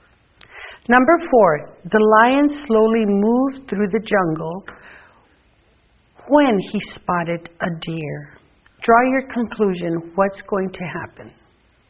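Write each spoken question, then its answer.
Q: Draw your conclusion. What's going to happen?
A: The lion is going to hunt the deer.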